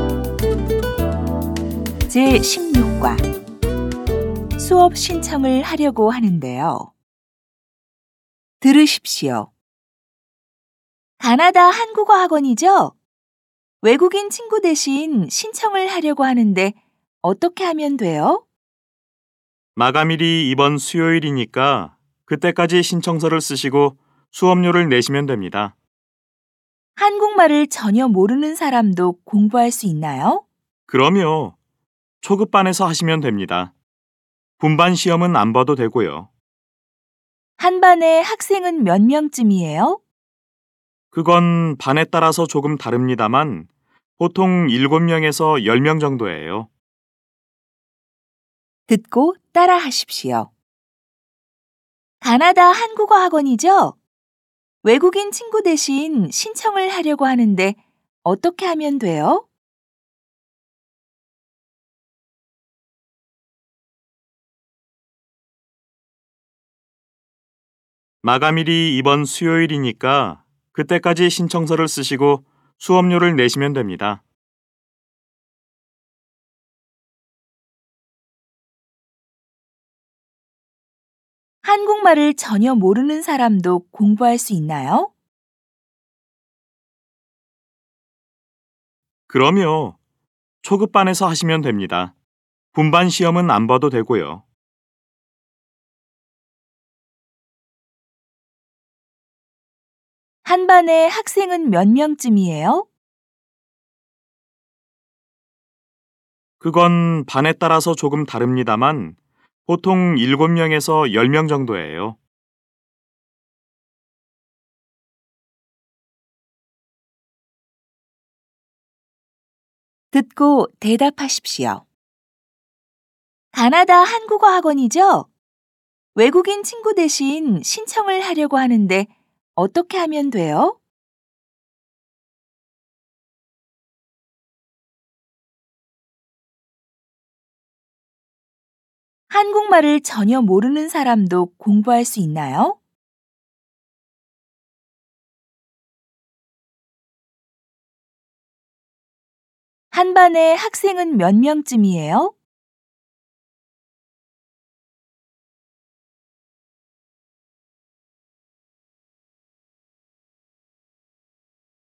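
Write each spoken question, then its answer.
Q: 가나다 한국어 학원이죠? 외국인 친구 대신 신청을 하려고 하는데 어떻게 하면 돼요?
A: 이번 수요일까지 신청서를 쓰고 수업료를 내면 됩니다.

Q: 한국말을 전혀 모르는 사람도 공부할 수 있나요?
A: 네, 초급반에서 하면 됩니다. 분반 시험은 안 봐도 됩니다.

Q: 한 반에 학생은 몇 명쯤이에요?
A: 보통 7명에서 10명 정도예요.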